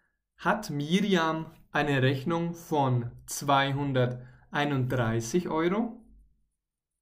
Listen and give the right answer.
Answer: Nein, nein, nein. Sie hat keine Rechnung von nur 231 Euro, sondern von 241 Euro.